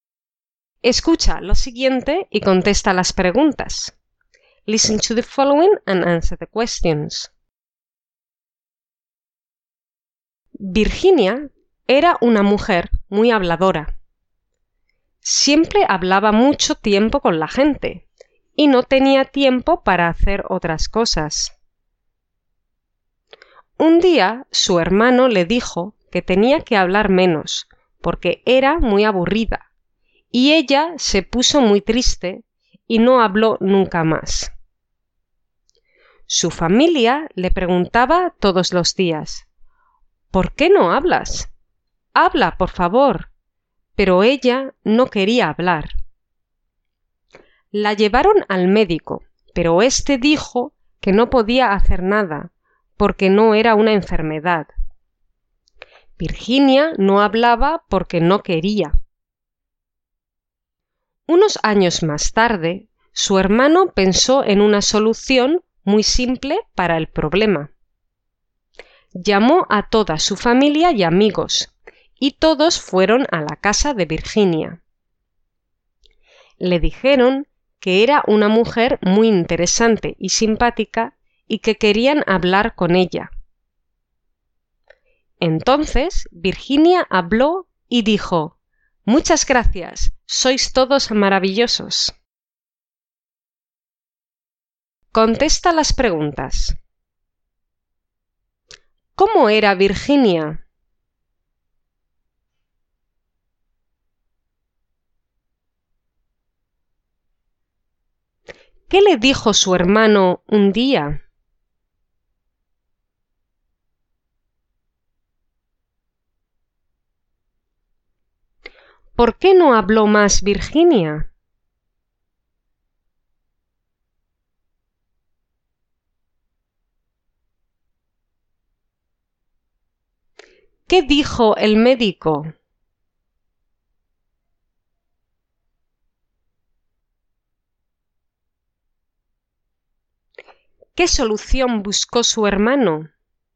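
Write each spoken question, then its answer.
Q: ¿Cómo era Virginia?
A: Era una mujer muy habladora

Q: ¿Qué le dijo su hermano un día?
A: Que tenía que hablar menos porque era muy aburrida

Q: ¿Por qué no habló más Virginia?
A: Porque se puso muy triste

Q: ¿Qué dijo el médico?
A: Que no podía hacer nada porque no era una enfermedad

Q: ¿Qué solución buscó su hermano?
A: Llamó a familia y amigos para decirle que era interesante y simpática y querían hablar con ella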